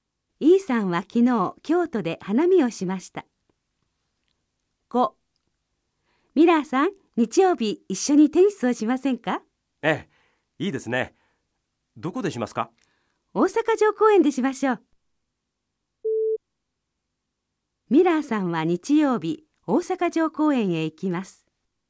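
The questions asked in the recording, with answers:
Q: ミラーさんは日曜日大阪城公園へ行きます。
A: ○(正しい)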